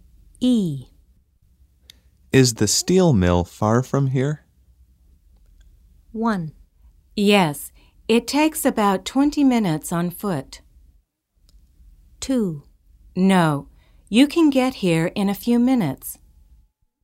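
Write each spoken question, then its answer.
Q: Is the steel mill far from here?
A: 1: Yes, it takes about 20 minutes on foot.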